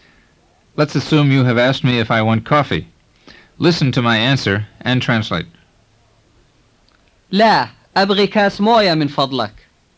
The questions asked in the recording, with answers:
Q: Listen to my answer and translate. لا, أبغي كاس موية من فضلك.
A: No, I want a glass of water, please.